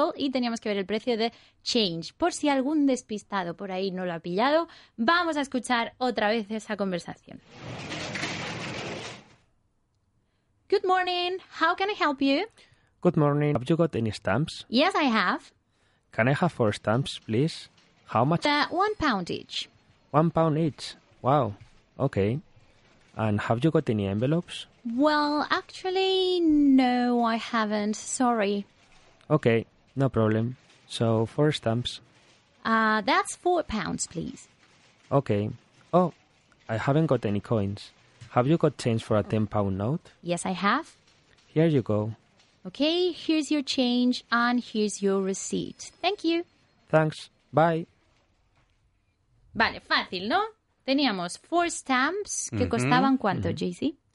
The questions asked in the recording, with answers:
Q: costaban ¿cuánto, uh-huh. JC?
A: £1 each.